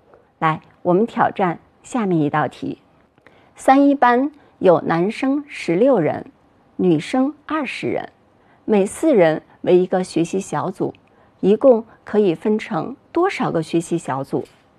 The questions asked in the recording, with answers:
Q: 三一班有男生16人,女生20人,每四人为一个学习小组,一共可以分成多少个学习小组?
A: 一共可以分为9个学习小组